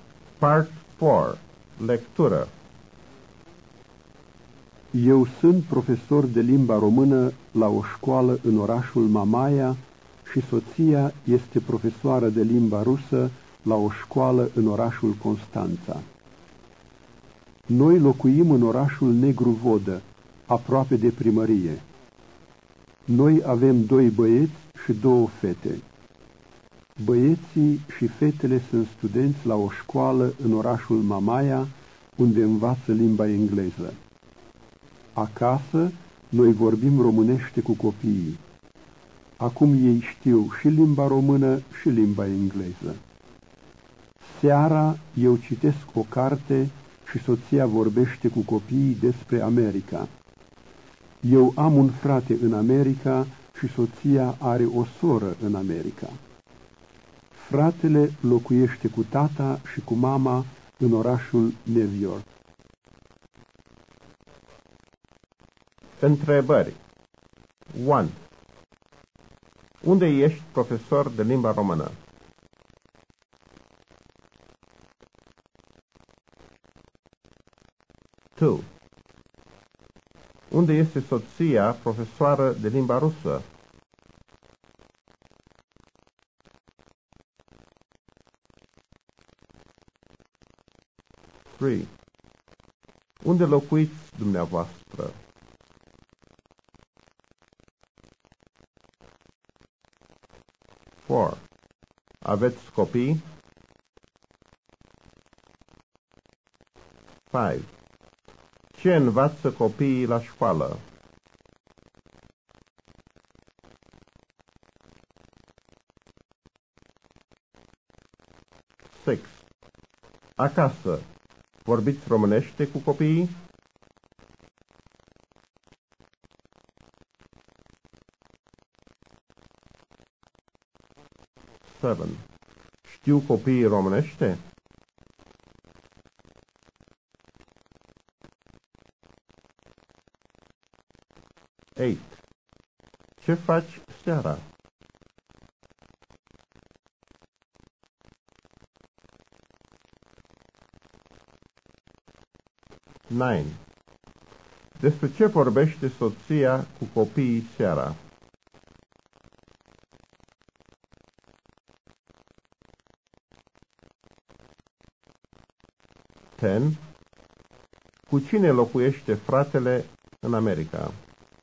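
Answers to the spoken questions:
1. La o școală în orașul Mamaia
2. La o școală în orașul Constanța
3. În orașul Negru Vodă, aproape de primărie
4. Da, doi băieți și două fete
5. Limba engleză
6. Da
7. Da
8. Citesc o carte
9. Despre America
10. Cu tata și cu mama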